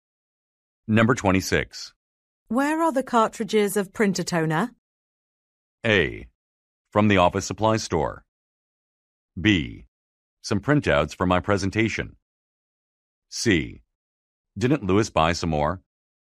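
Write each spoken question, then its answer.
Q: Where are the cartridges of printer toner?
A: C: Didn't Lewis buy some more?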